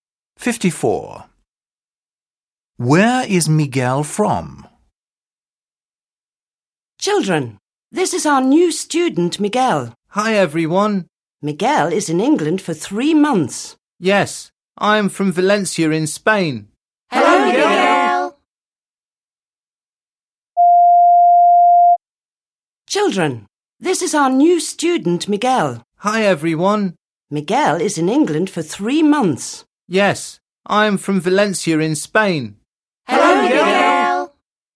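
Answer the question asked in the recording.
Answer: Valencia, Spain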